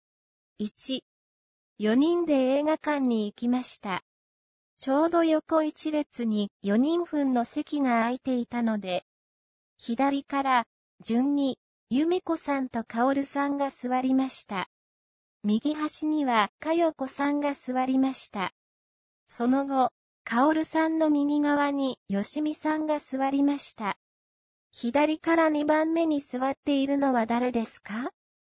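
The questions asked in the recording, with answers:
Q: 左から二番目に座っているのは誰ですか?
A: カオルさん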